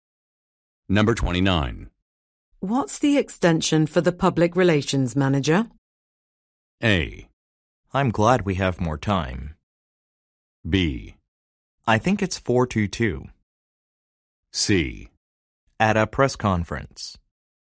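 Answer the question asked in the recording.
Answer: B: I think it's 4:22.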